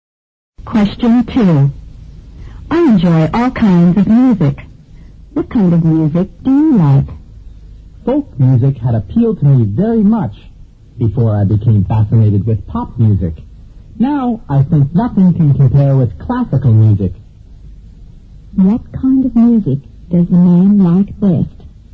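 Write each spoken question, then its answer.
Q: What kind of music does the man like best?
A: Classical music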